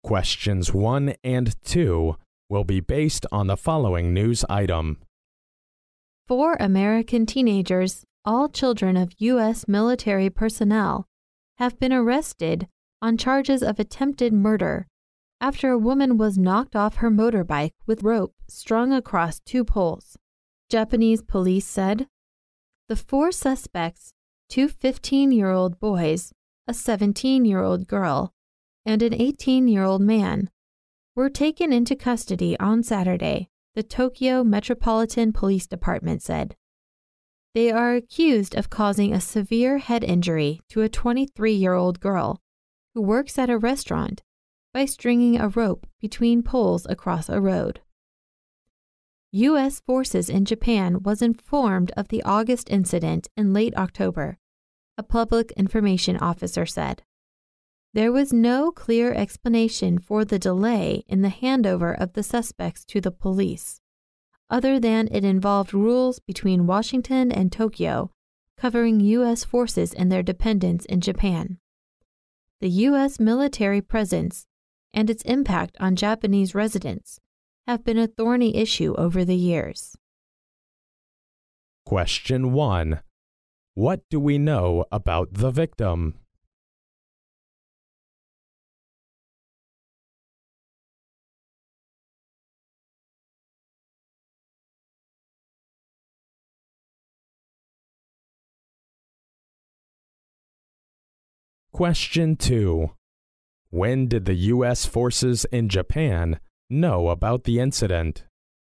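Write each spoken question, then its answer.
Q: What do we know about the victim?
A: She is a 23-year-old woman who works at a restaurant and got a severe head injury after being knocked off her motorbike.

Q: When did the U.S. forces in Japan know about the incident?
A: In late October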